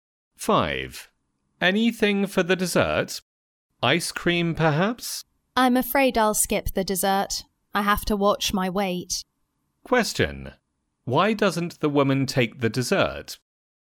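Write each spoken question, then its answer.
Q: Why doesn't the woman take the dessert?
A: She is watching her weight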